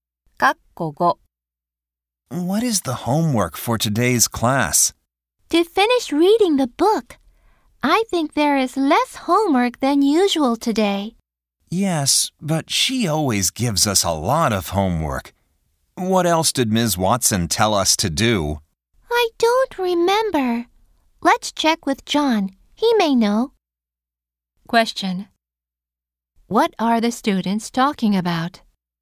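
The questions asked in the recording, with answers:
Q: What are the students talking about?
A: Their homework for today's class.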